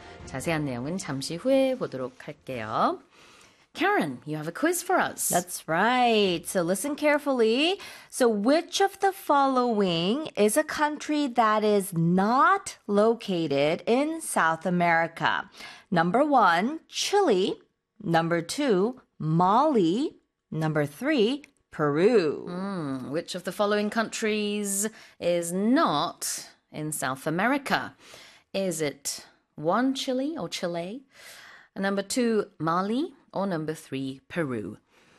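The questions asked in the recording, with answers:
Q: So which of the following is a country that is not located in South America?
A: 2: Mali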